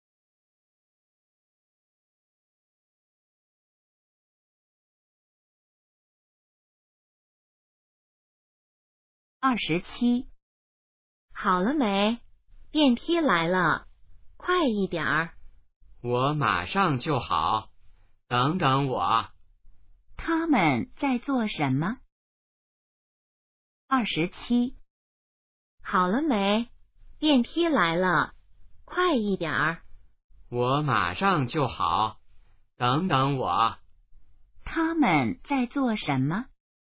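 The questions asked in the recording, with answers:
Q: 他们在做什么?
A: 等电梯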